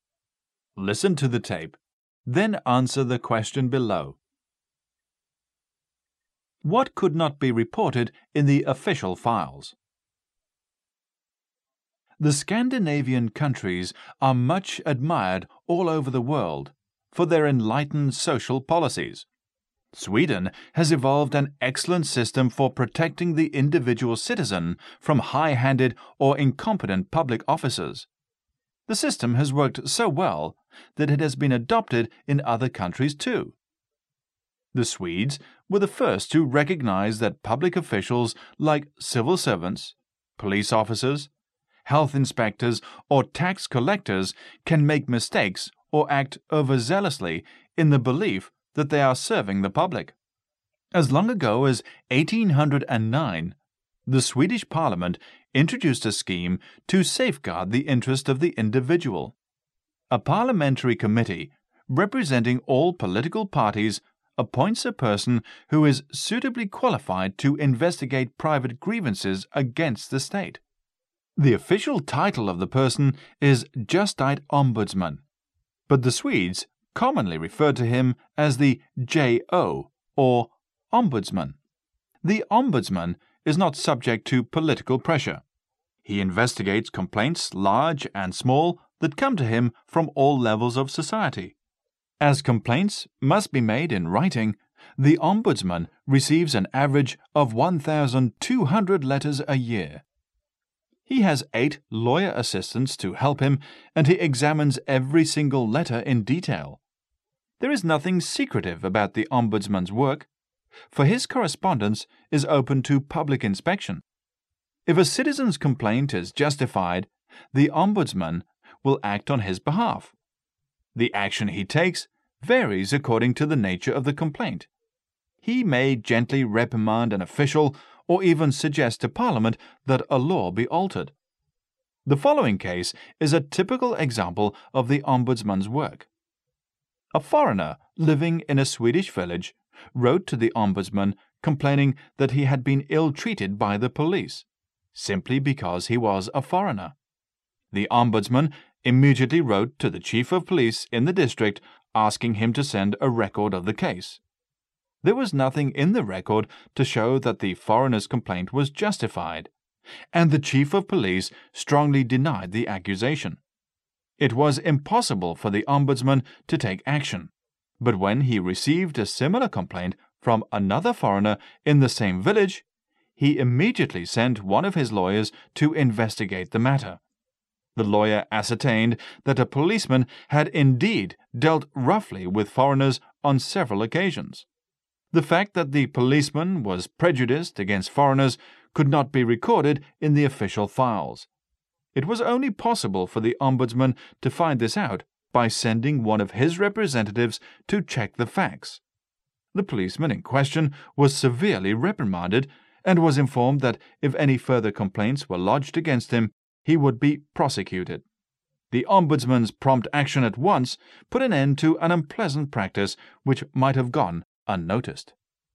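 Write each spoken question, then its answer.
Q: What could not be reported in the official files?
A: The fact that the policeman was prejudiced against foreigners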